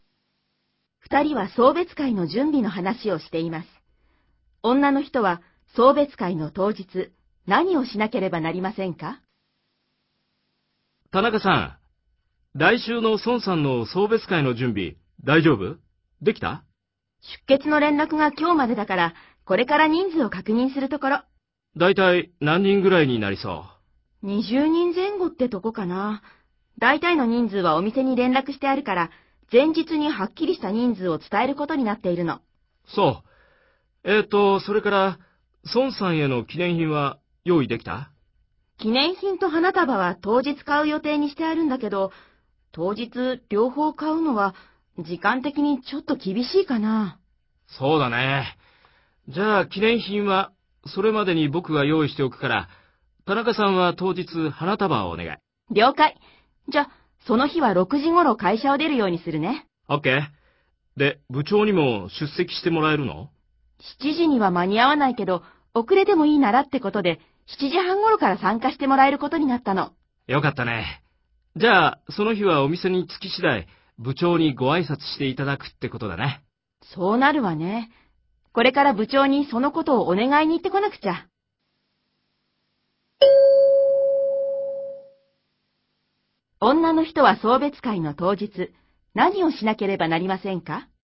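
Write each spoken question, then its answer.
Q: 女の人は送別会の当日、何をしなければなりませんか?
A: 花束を買う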